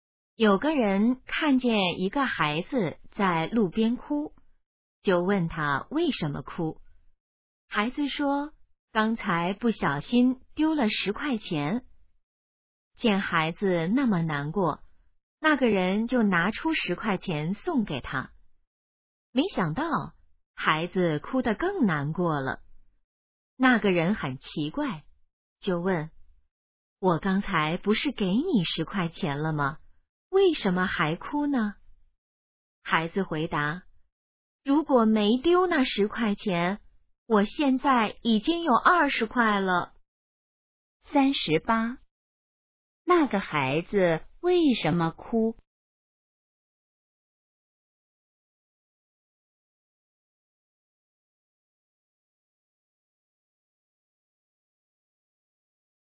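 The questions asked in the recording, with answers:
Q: 那个孩子为什么哭?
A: 丢了10块钱

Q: 那个孩子现在有多少钱?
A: 10块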